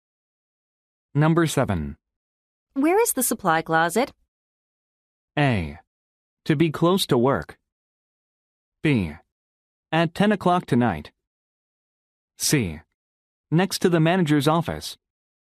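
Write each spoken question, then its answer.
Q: Where is the supply closet?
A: C: Next to the manager's office.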